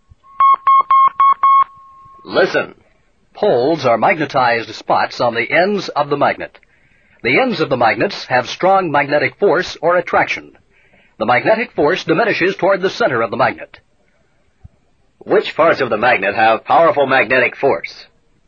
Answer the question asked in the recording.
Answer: The ends. The ends have powerful magnetic force.